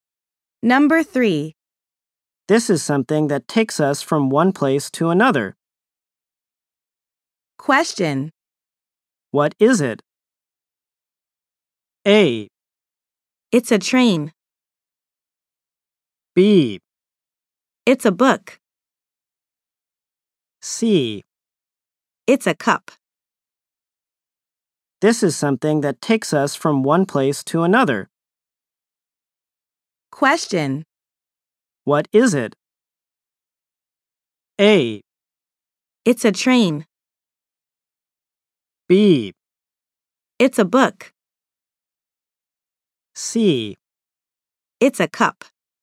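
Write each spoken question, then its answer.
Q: What is it?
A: A: It's a train.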